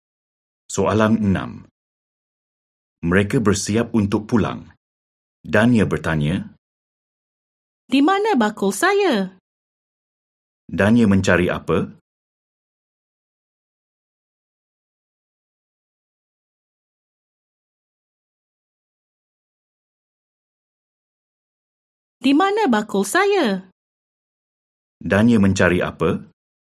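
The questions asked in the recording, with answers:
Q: Dania mencari apa?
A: Bakul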